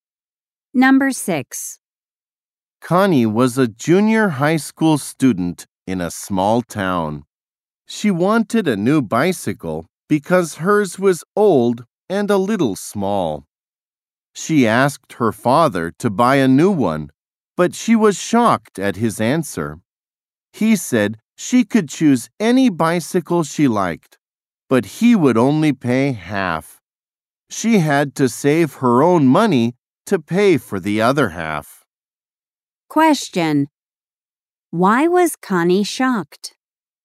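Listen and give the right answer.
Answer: Her father would only pay half for the bicycle.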